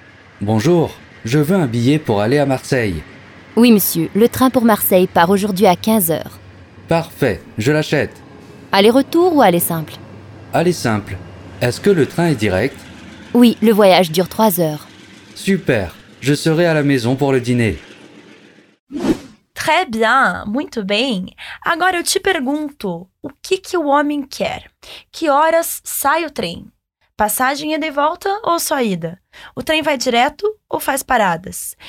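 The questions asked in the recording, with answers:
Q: o que que o homem quer?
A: Uma passagem para ir para Marselha.

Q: Que horas sai o trem?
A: Às 15 horas

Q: Passagem ida é e volta ou só ida?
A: Só ida

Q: O trem vai direto ou faz paradas?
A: Vai direto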